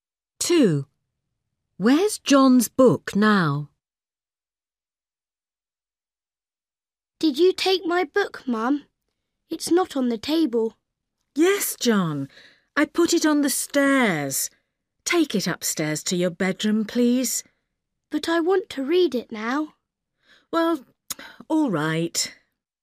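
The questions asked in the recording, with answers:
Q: Where's John's book now?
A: on the stairs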